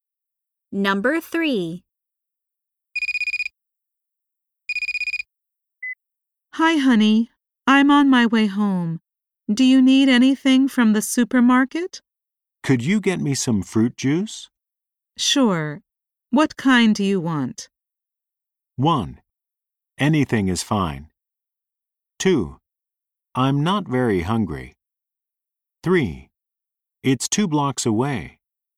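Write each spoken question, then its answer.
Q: Sure. What kind do you want?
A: 1: Anything is fine.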